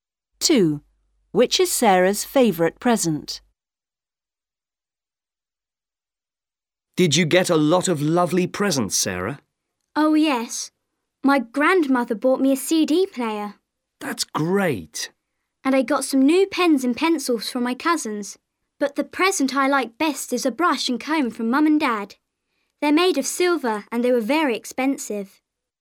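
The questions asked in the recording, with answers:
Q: Which is Sarah's favourite present?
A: A silver brush and comb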